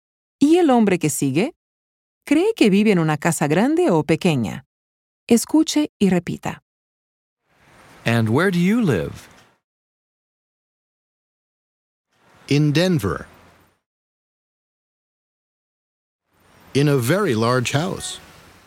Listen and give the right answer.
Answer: El señor vive en una casa grande en Denver.